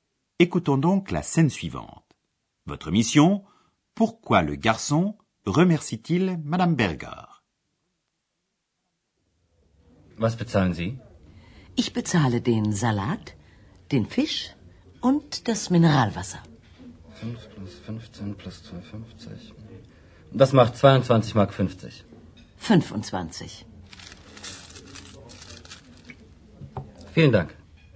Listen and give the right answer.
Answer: Le garçon remercie Madame Berger du pourboire qu'elle lui a donné.